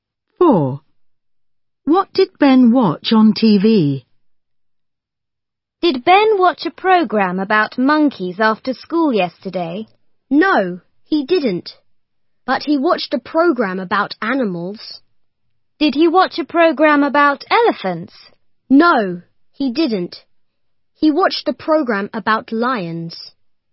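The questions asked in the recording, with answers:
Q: What did Ben watch on TV?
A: a program about lions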